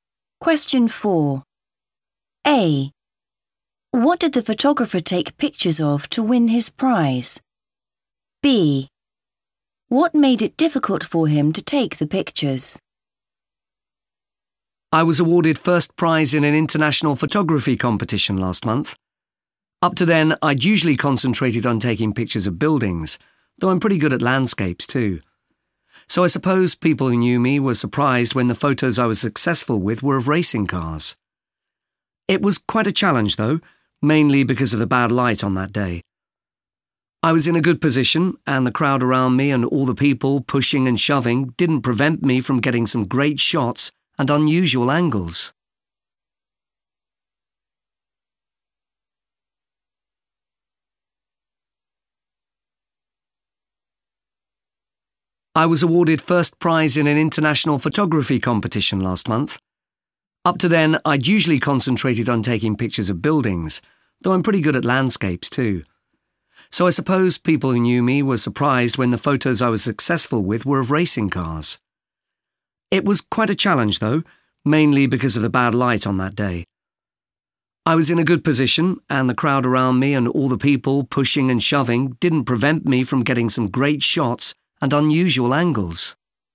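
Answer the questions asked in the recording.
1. racing cars
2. bad light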